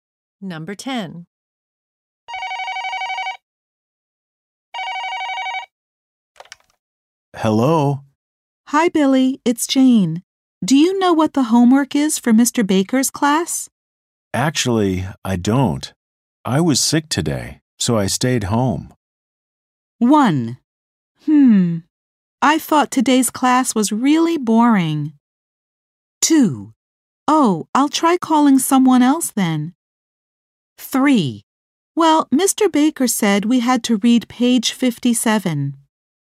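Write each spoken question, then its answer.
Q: Actually, I don't. I was sick today, so I stayed home.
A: 2: Oh, I'll try calling someone else then.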